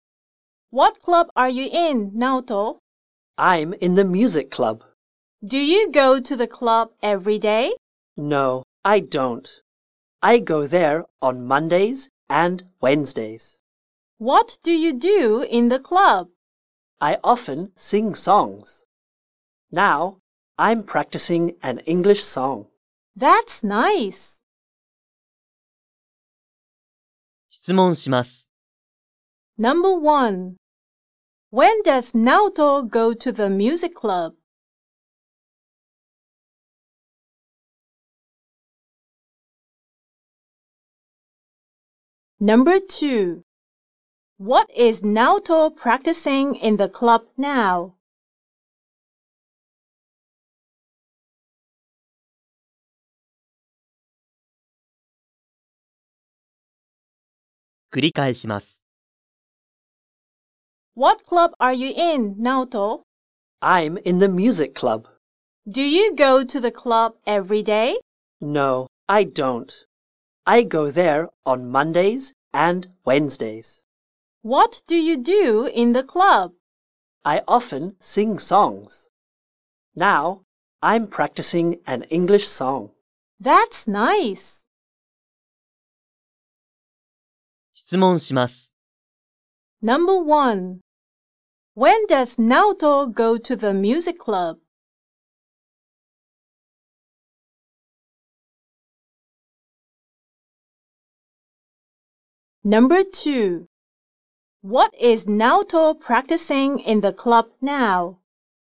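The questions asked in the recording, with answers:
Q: When does Naoto go to the music club?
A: On Mondays and Wednesdays.

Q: What is Naoto practicing in the club now?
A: An English song.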